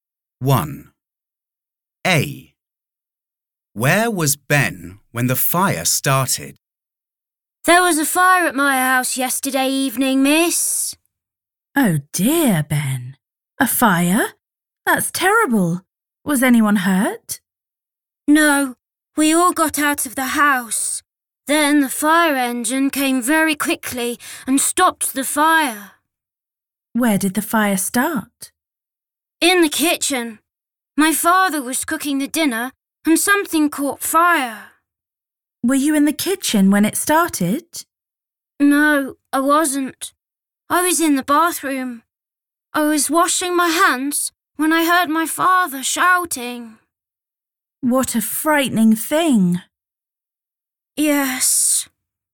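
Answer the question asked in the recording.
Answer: In the bathroom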